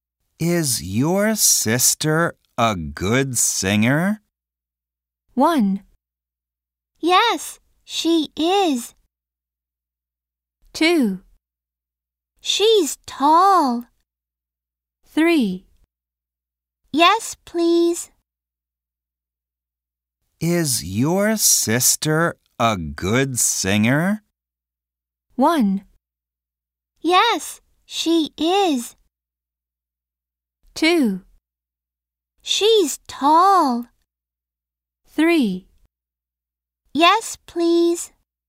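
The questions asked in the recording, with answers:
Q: Is your sister a good singer?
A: 1: Yes, she is.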